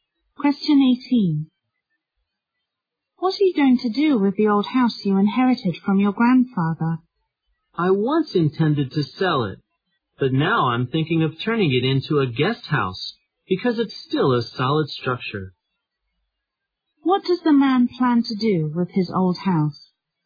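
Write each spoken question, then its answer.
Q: What does the man plan to do with his old house?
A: Turn it into a guest house.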